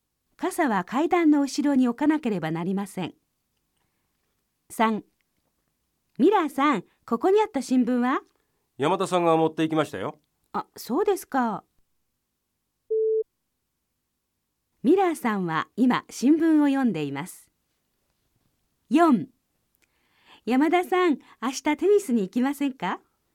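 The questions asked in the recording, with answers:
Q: ミラーさんは今新聞を読んでいます。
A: ×(正しくない)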